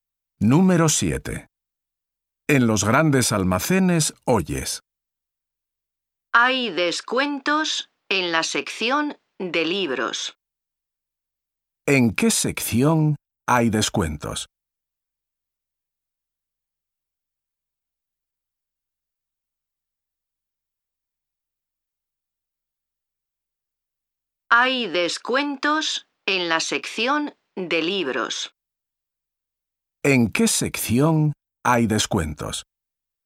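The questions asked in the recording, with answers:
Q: ¿En qué sección hay descuentos?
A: En la sección de libros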